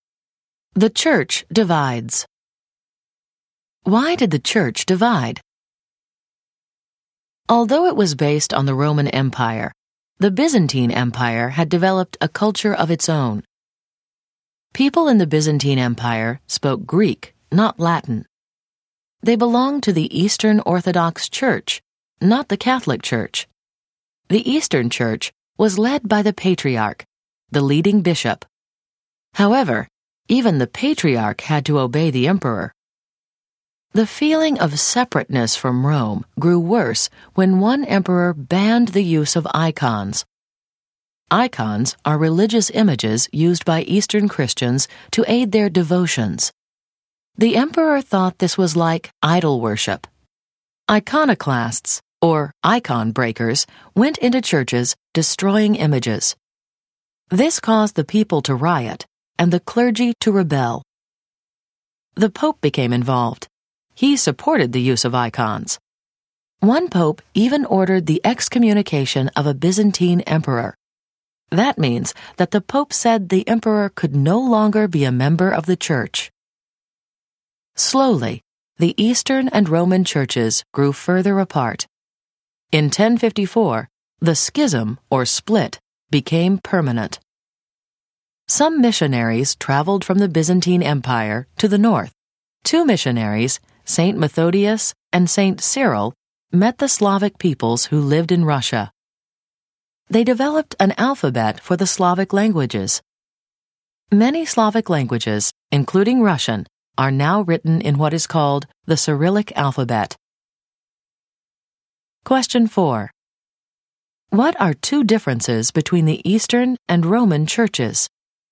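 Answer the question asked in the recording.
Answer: The Eastern Church spoke Greek, not Latin, and was led by the Patriarch, who obeyed the emperor, not by the Pope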